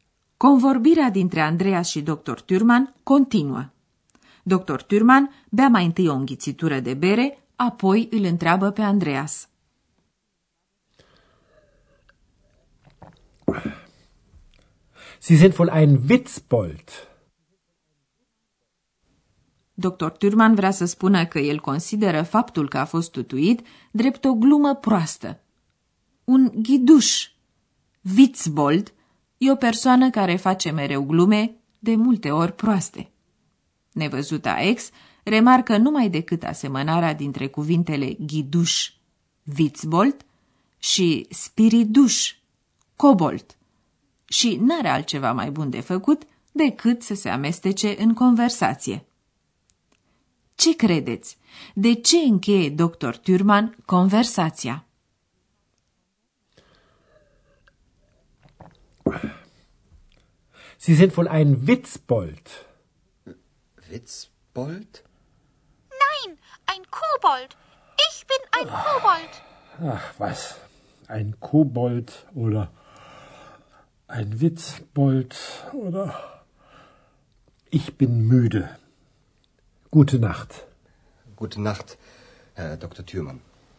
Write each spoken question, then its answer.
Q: De ce încheie doctor Turman conversația?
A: Dr. Thürmann termină conversația pentru că e obosit, müde.